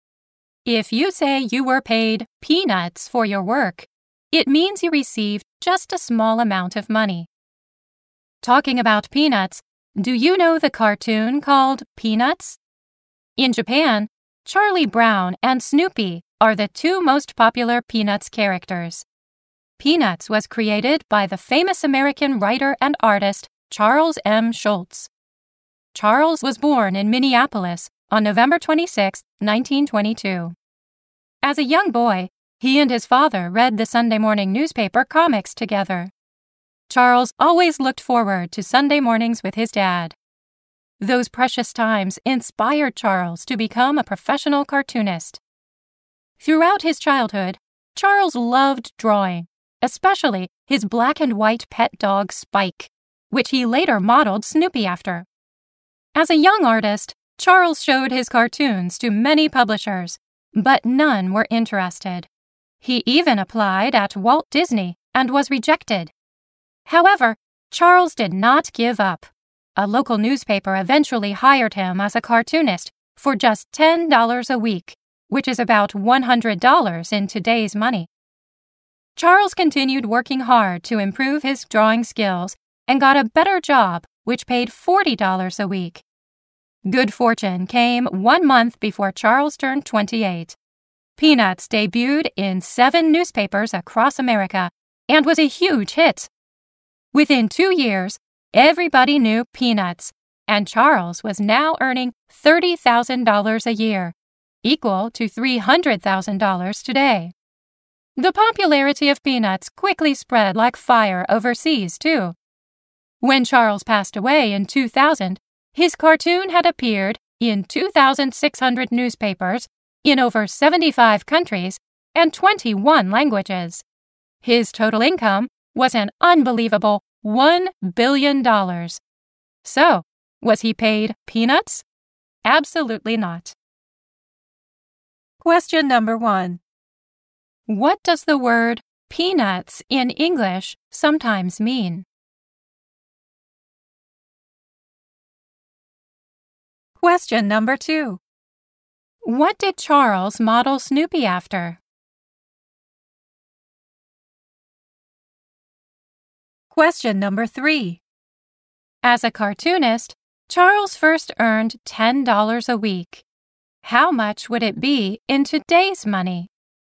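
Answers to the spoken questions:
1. A small amount of money
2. His black and white pet dog Spike
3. About $100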